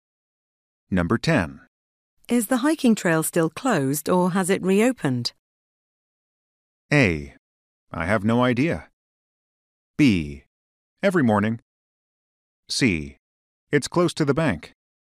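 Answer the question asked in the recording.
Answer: A: I have no idea.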